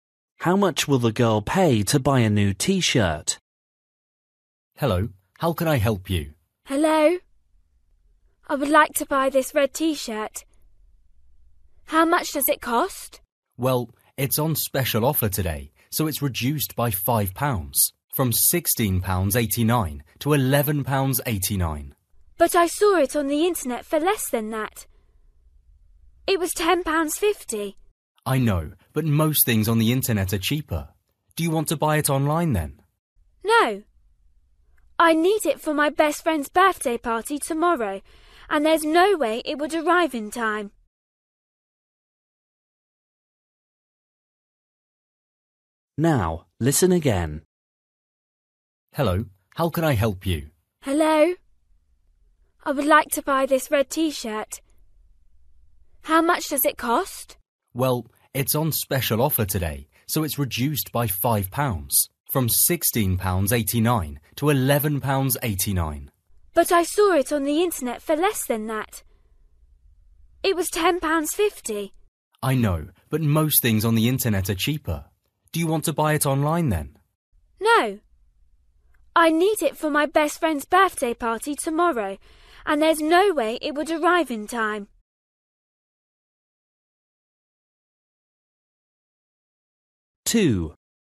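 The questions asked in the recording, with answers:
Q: How much will the girl pay to buy a new T-shirt?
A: £11.89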